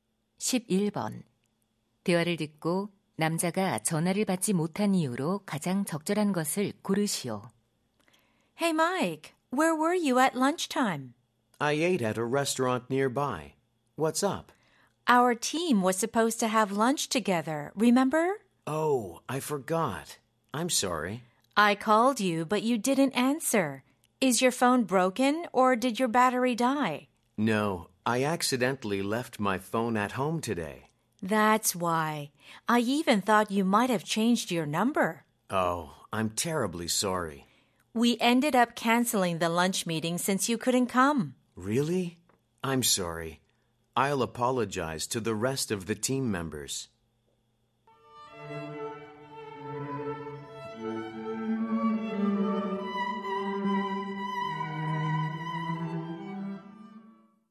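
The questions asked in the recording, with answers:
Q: 대화를 듣고 남자가 전화를 받지 못한 이유로 가장 적절한 것을 고르시오.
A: 실수로 휴대폰을 집에 두고 와서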